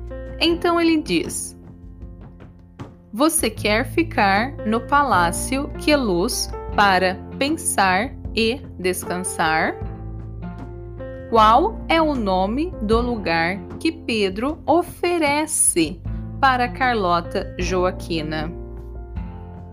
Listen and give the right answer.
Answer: Ele oferece o palácio que é luz para que ela pense e descanse.